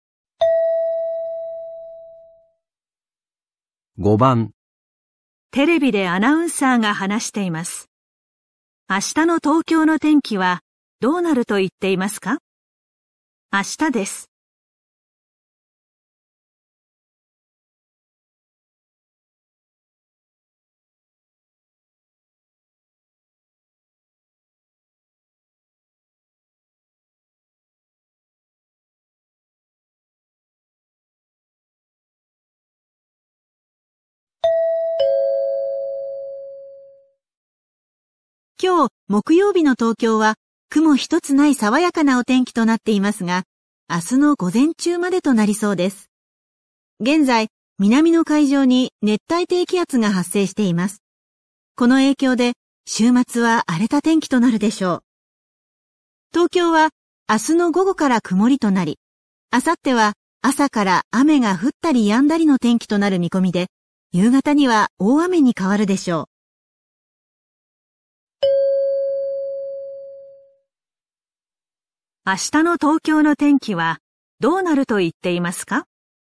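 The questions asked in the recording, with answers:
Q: 明日の東京の天気はどうなると言っていますか?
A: 午前中は晴れ、午後から曇り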